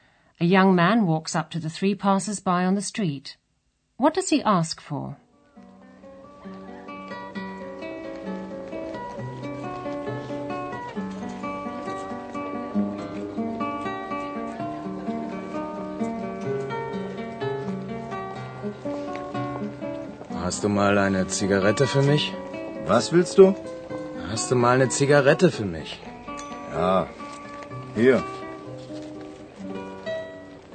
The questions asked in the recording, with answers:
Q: What does he ask for?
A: The young man asks them for a cigarette.